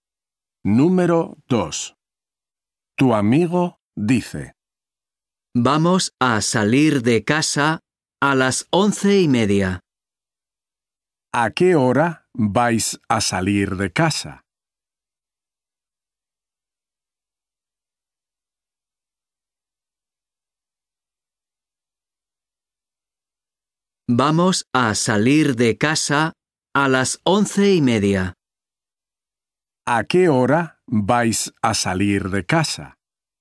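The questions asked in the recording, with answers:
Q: ¿A qué hora vais a salir de casa?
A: A las 11:30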